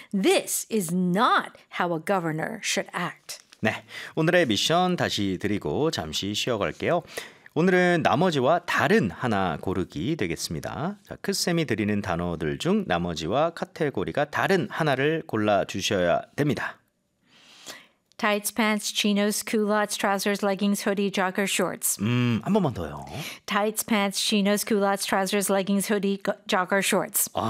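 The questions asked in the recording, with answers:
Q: 자, 크쌤이 드리는 단어들 중 나머지와 카테고리가 다른 하나를 골라주셔야 됩니다.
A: hoodie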